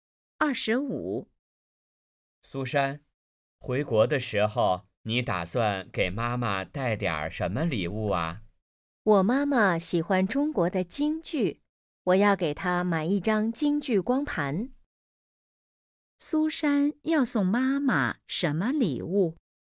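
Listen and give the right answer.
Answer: 京剧光盘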